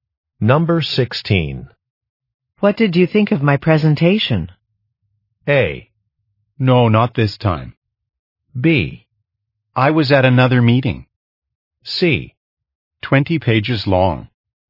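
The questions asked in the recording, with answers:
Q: What did you think of my presentation?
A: B: I was at another meeting.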